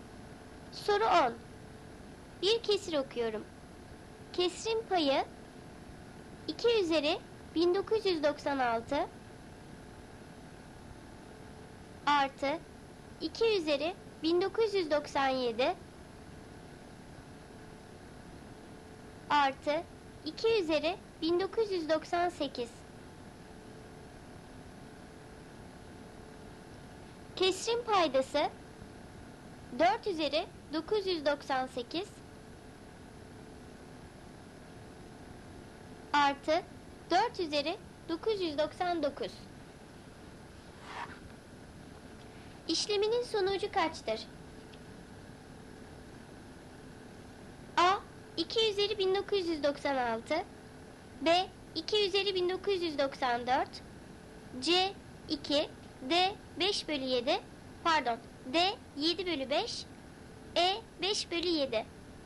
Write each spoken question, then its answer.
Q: İşleminin sonucu kaçtır?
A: Doğru cevap D. 7 bölü 5.